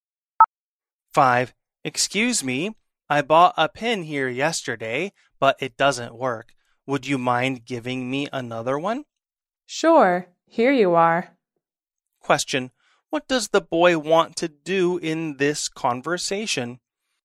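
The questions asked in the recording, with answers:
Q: What does the boy want to do in this conversation?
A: Change the pen for another one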